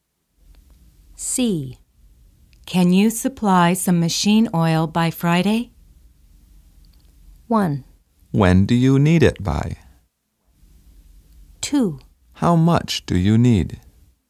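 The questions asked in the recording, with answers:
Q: Can you supply some machine oil by Friday?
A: 2: How much do you need?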